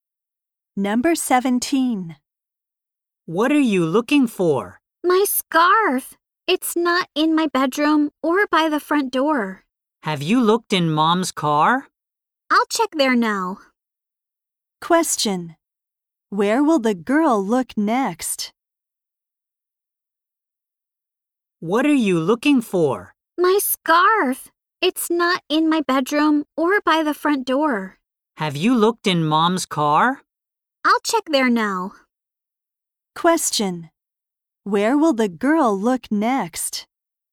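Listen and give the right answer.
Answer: In her mom's car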